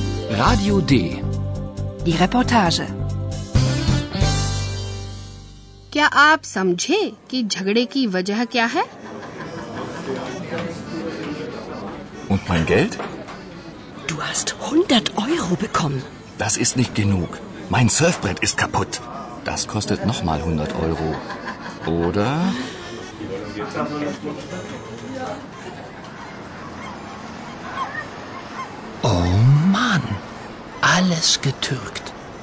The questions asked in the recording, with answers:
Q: क्या आप समझे कि झगड़े की वजह क्या है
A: झगड़े की वजह है प्यारा पैसा